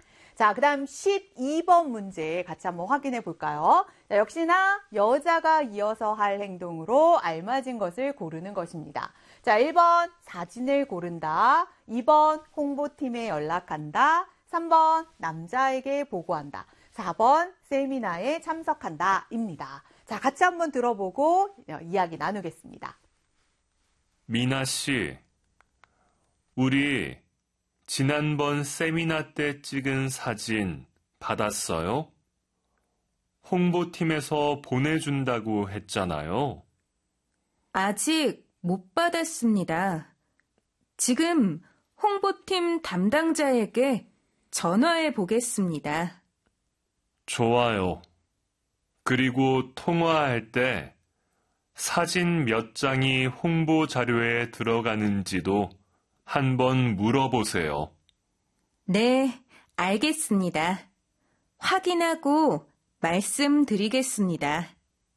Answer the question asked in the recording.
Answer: 홍보팀에 연락한다? 맞습니다. 정답은 2번이 되겠습니다.